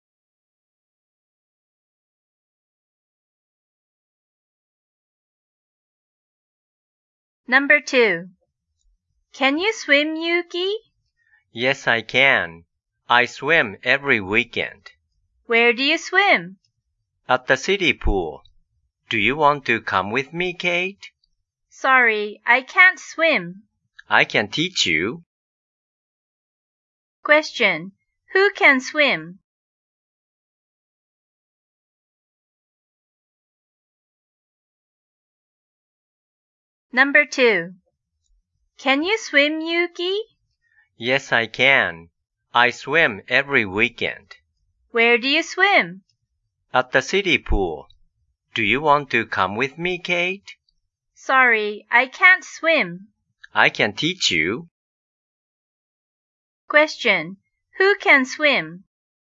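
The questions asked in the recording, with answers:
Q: Who can swim?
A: Yuki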